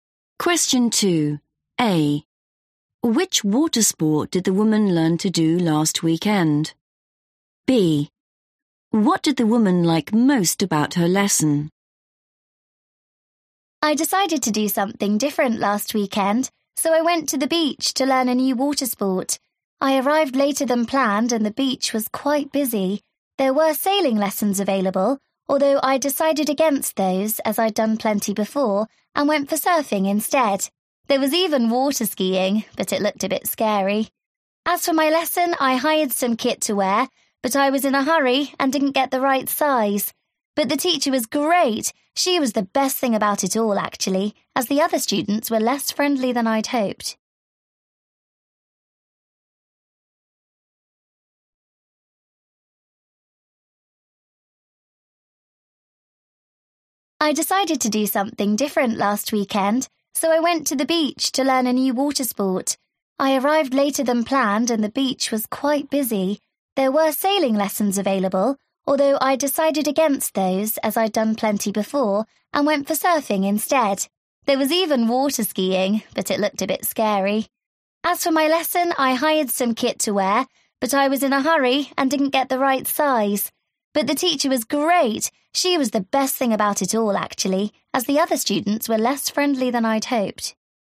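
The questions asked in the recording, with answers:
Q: Which water sport did the woman learn to do last weekend?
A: surfing

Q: What did the woman like most about her lesson?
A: the teacher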